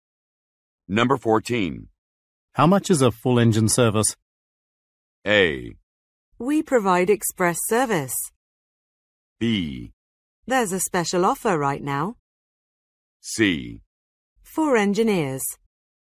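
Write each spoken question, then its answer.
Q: How much is a full engine service?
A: B: There's a special offer right now.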